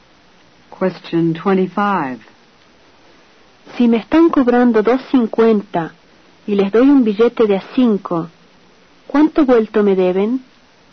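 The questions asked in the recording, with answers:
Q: Si me están cobrando 2.50 y les doy un billete de a 5, ¿cuánto vuelto me deben?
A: 2.50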